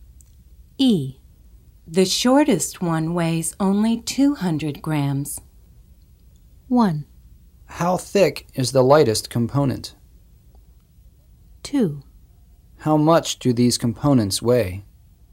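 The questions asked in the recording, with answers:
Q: How much do these components weigh?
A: 2: How much do these components weigh?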